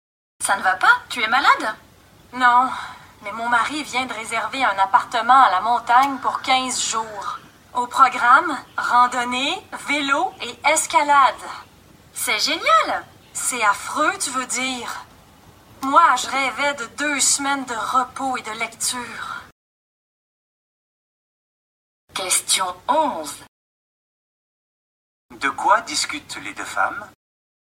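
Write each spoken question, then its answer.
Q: De quoi discutent les deux femmes?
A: Des vacances à la montagne prévues par le mari, qui ne plaisent pas à la femme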